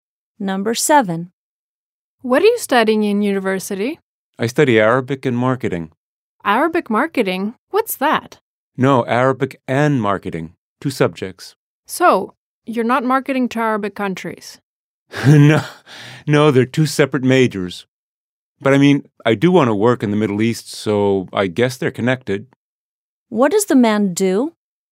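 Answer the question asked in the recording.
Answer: He studies Arabic and marketing at university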